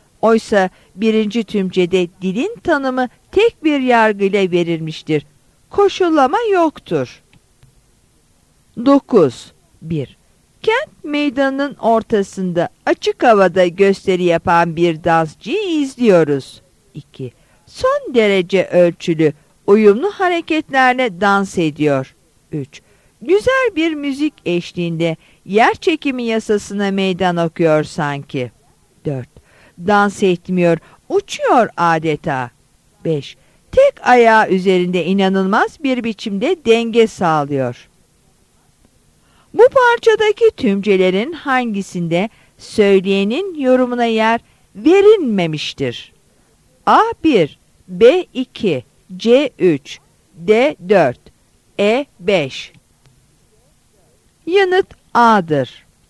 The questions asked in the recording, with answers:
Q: Bu parçadaki tümcelerin hangisinde söyleyenin yorumuna yer verilmemiştir?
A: Yanıt A'dır.